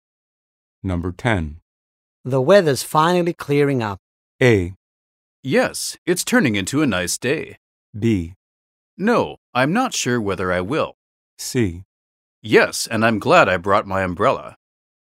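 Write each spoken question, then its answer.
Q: The weather's finally clearing up.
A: A: Yes, it's turning into a nice day.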